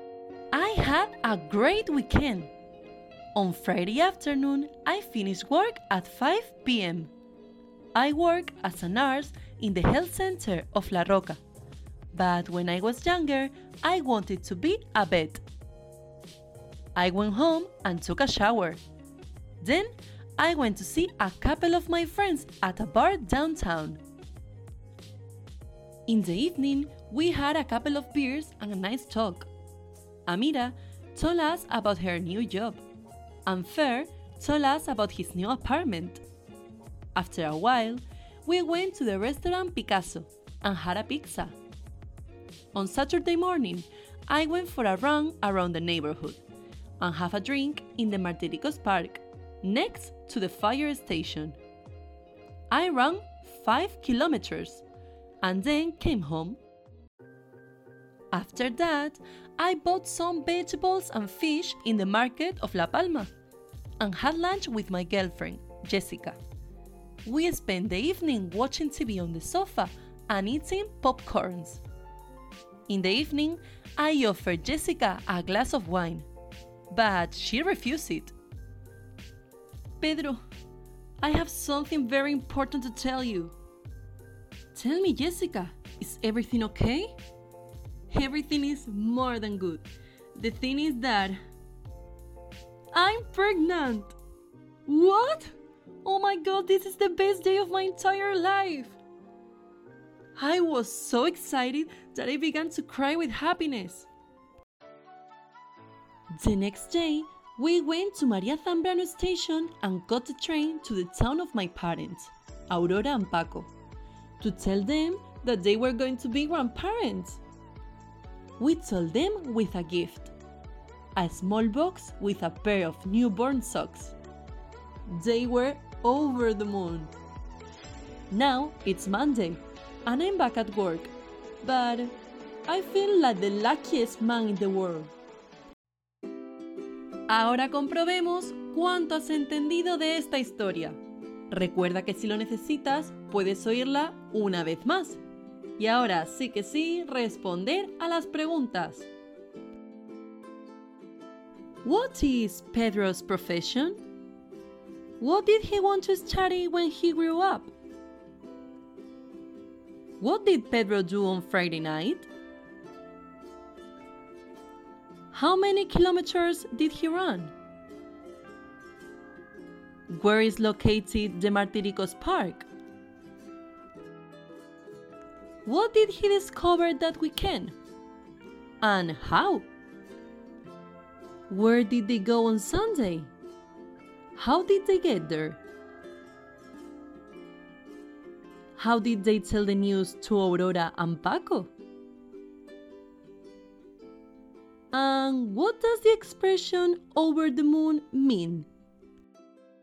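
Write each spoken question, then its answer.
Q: What is Pedro's profession?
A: He is a nurse

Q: What did he want to study when he grew up?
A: To be a vet

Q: What did Pedro do on Friday night?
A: He met friends at a bar, had beers, then had pizza at restaurant Picasso

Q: How many kilometers did he run?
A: 5 kilometers

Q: Where is located the Martiricos Park?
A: Next to the fire station

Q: What did he discover that weekend?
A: That Jessica is pregnant

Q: And how? Where did they go on Sunday?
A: To his parents' town

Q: How did they get there?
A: By train

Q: How did they tell the news to Aurora and Paco?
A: With a gift: a small box with newborn socks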